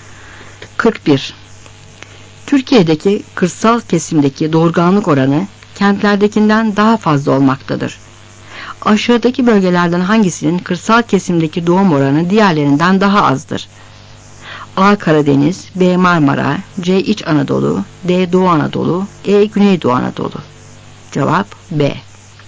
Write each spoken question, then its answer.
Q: Aşağıdaki bölgelerden hangisinin kırsal kesimdeki doğum oranı diğerlerinden daha azdır?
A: Cevap B.